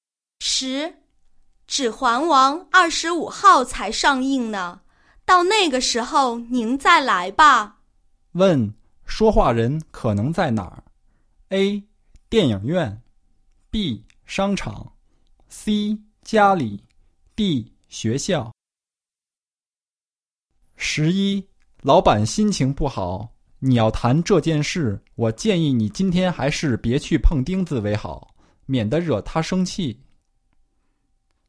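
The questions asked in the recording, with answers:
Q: 问,说话人可能在哪儿?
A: A: 电影院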